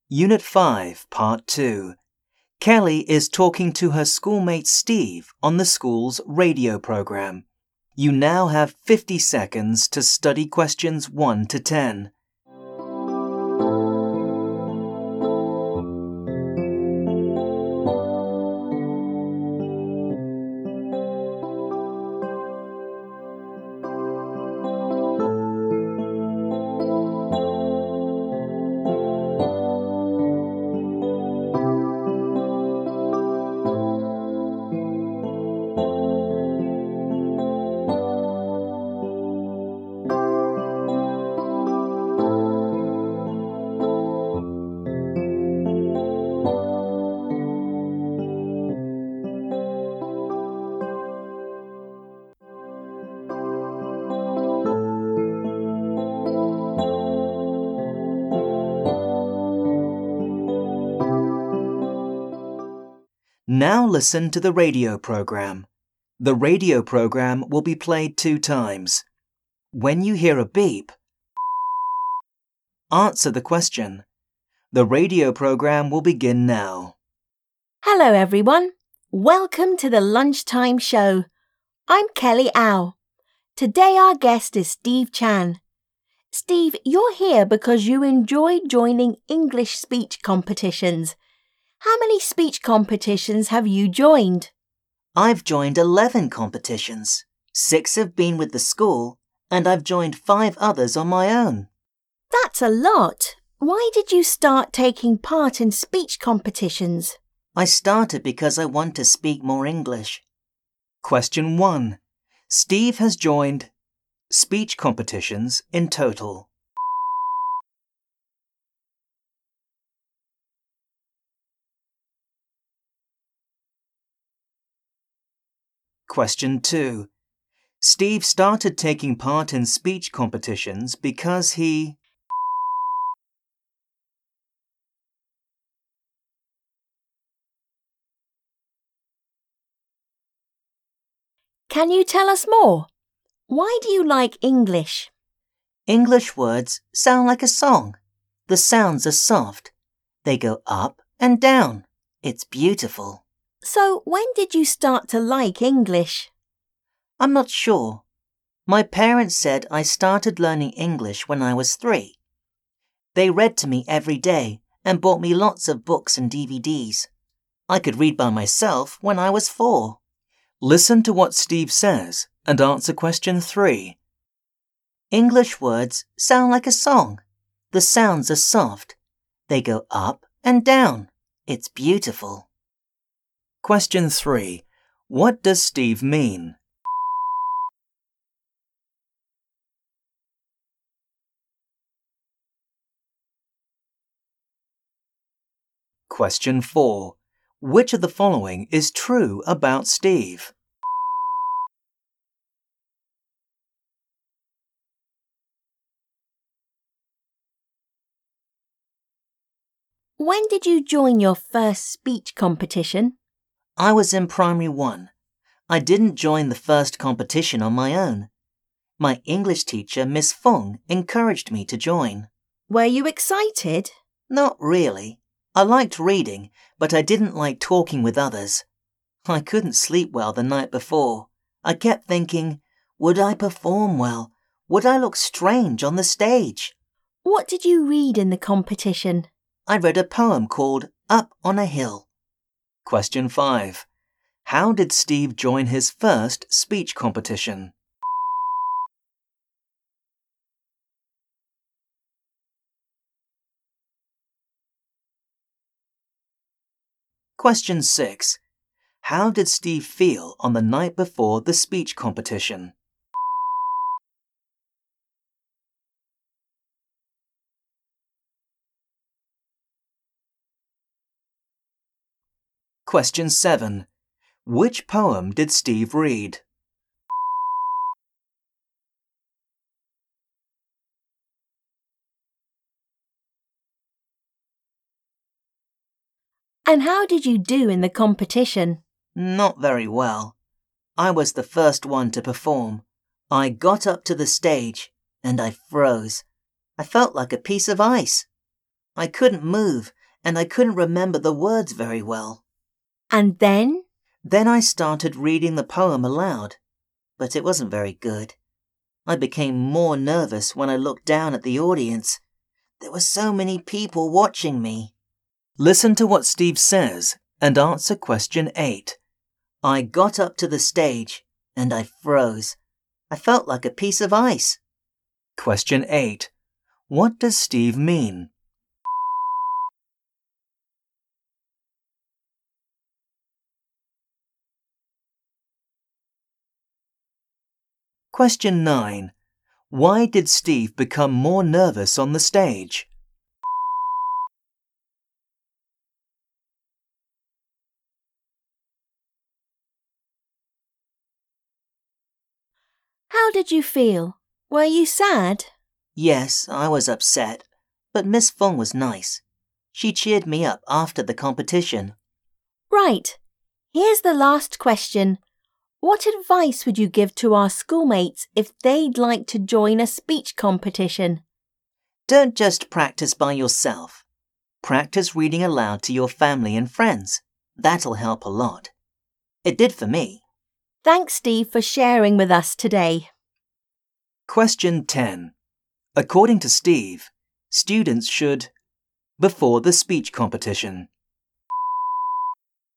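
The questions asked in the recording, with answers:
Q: Steve has joined speech competitions in total.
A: 11

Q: Steve started taking part in speech competitions because he...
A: wanted to speak more English

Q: How did Steve join his first speech competition?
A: His English teacher, Miss Fung, encouraged him to join

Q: How did Steve feel on the night before the speech competition?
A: Nervous and worried; he couldn't sleep well

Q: Which poem did Steve read?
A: Up on a Hill

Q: Why did Steve become more nervous on the stage?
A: He looked down and saw so many people watching him

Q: According to Steve, students should before the speech competition.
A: practise reading aloud to their family and friends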